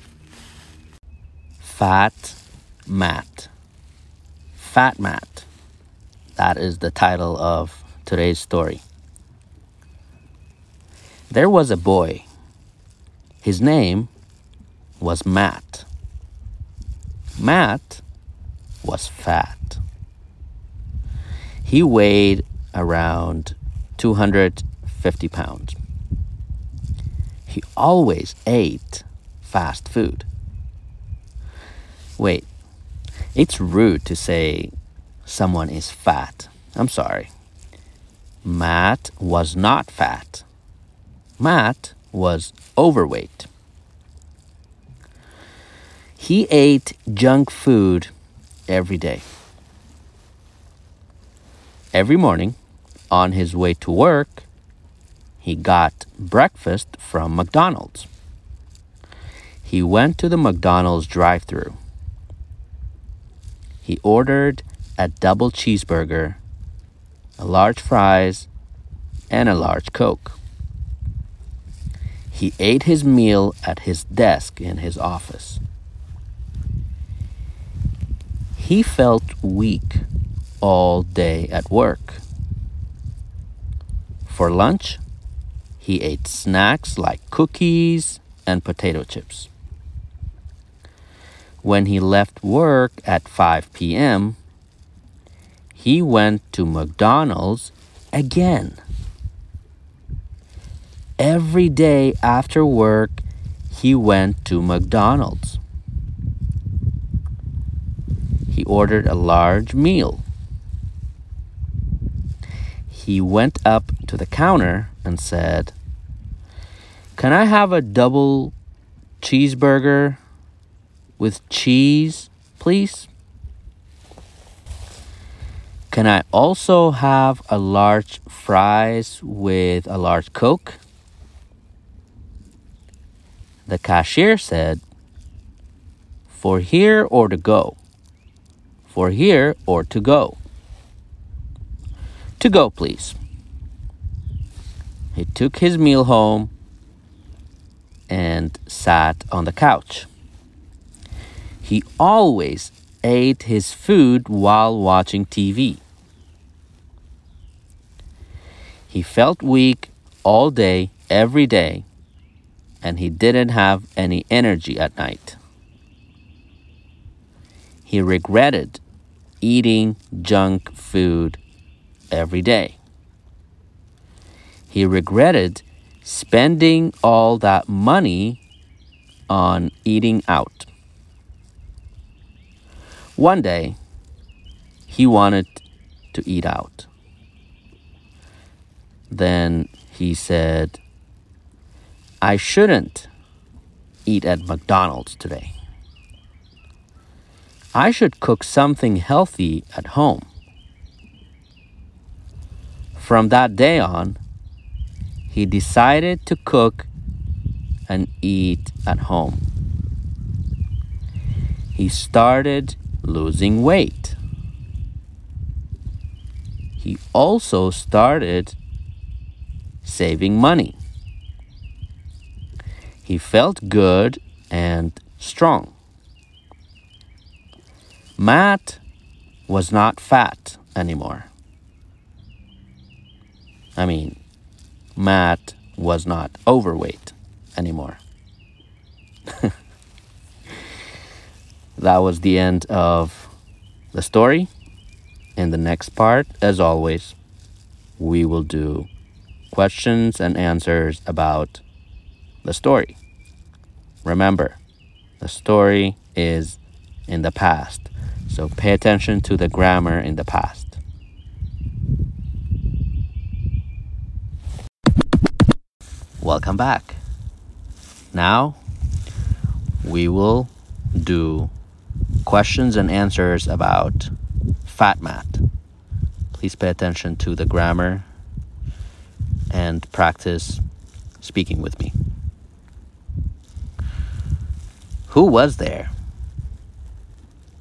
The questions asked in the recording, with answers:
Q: Who was there?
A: There was a boy.